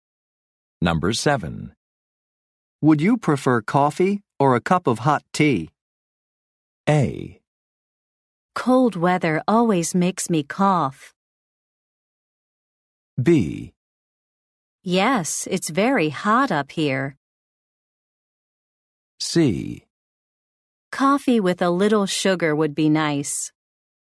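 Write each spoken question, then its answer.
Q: Would you prefer coffee or a cup of hot tea?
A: C: Coffee with a little sugar would be nice.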